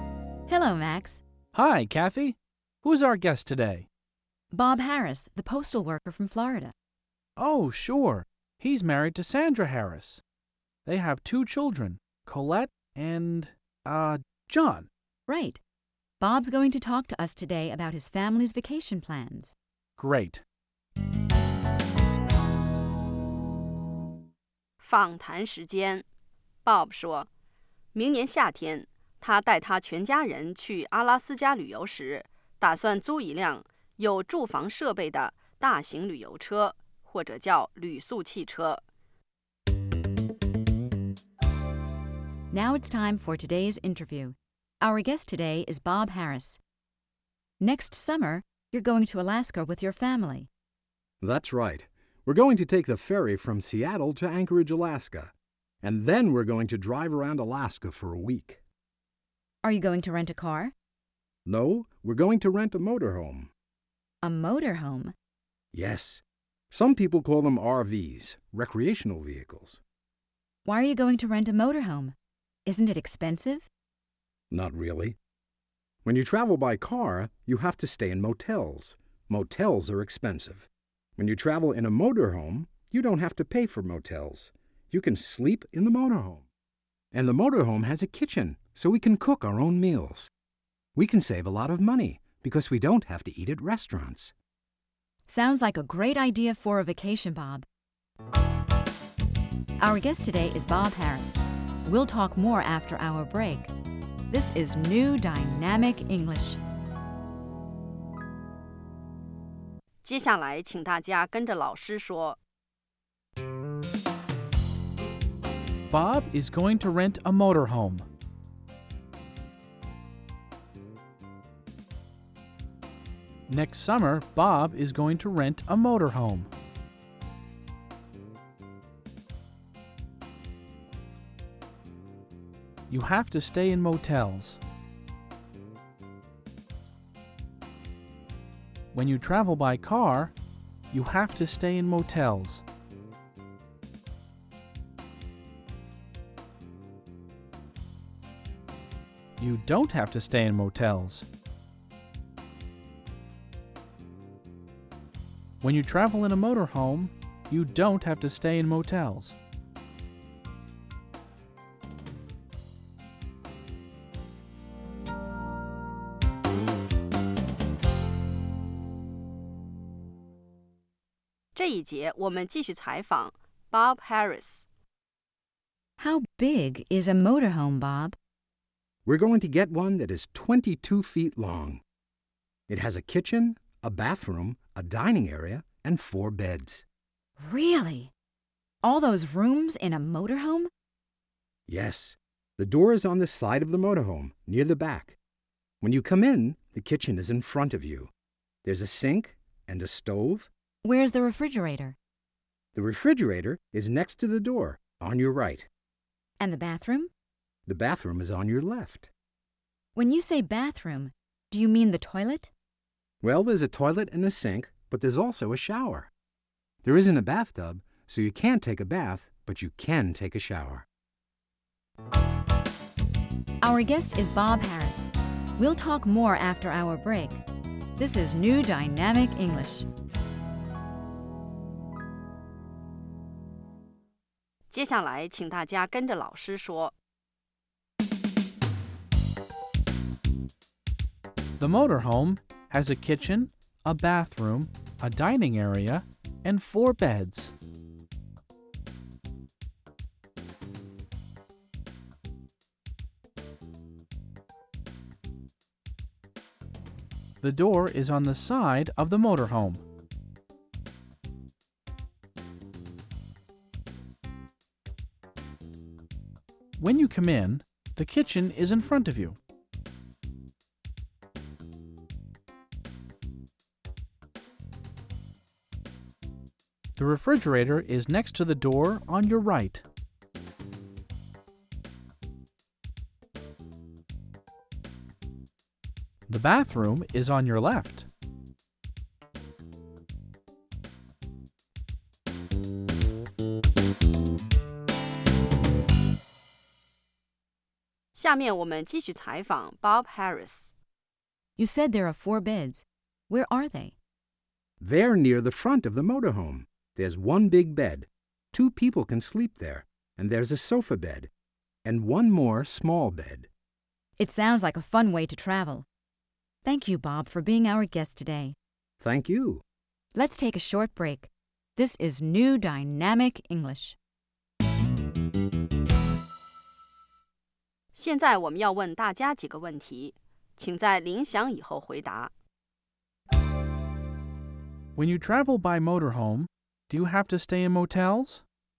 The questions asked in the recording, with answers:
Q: When you travel by motorhome, do you have to stay in motels?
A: No, you don't. You don't have to stay in motels because you can sleep in your motorhome.